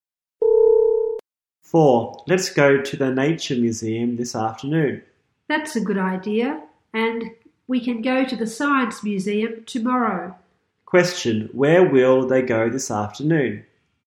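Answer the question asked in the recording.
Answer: The Nature Museum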